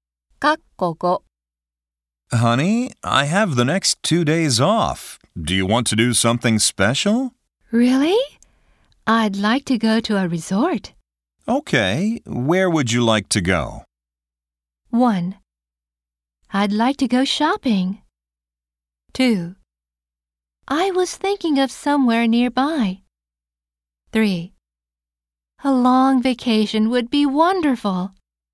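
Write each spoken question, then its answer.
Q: Okay, where would you like to go?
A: 2: I was thinking of somewhere nearby.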